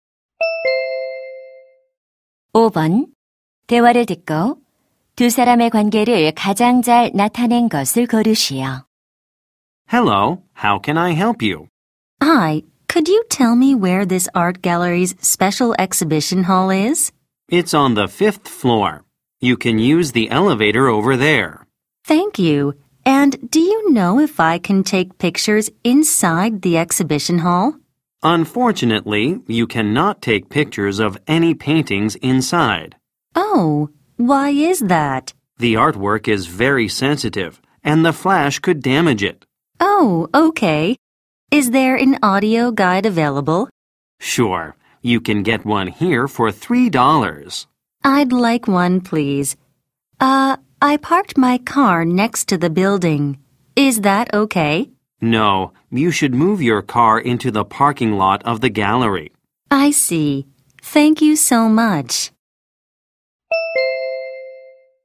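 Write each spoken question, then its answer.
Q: 대화를 듣고 두 사람의 관계를 가장 잘 나타낸 것을 고르시오.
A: 미술관 직원 - 관람객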